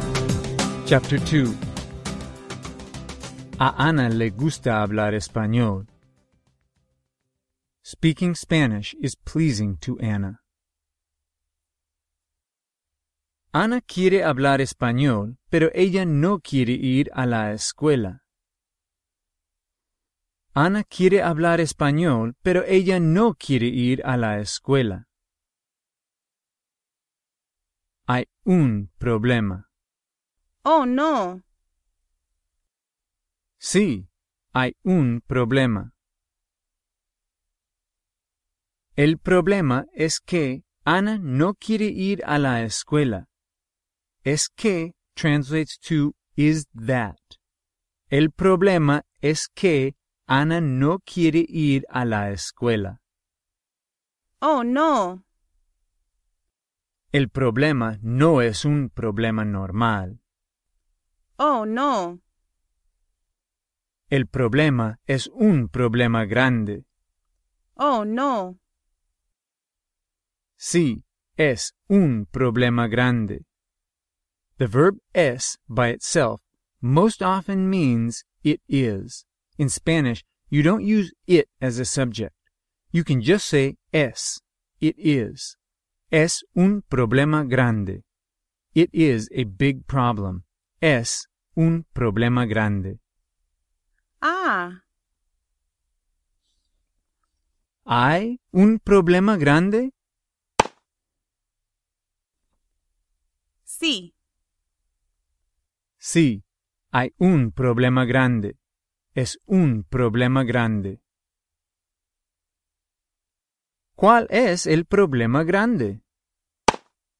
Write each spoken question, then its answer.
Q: ¿Cuál es el problema grande?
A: Ana no quiere ir a la escuela.